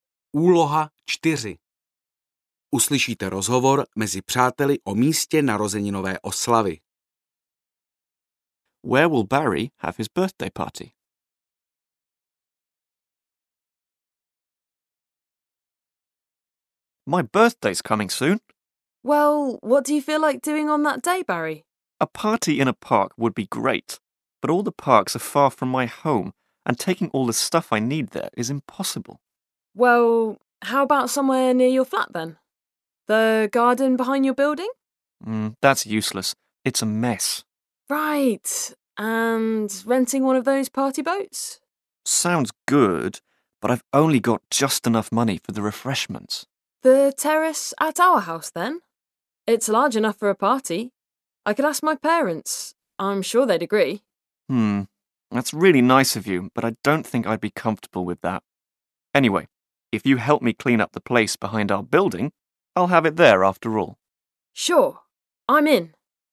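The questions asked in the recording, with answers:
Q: Where will Barry have his birthday party?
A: In the garden behind his building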